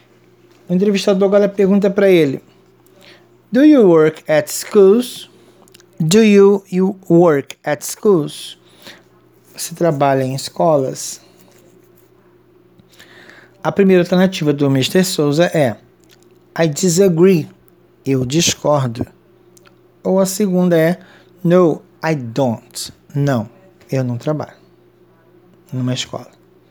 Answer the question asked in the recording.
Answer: Yes, a resposta certa é No, I don't.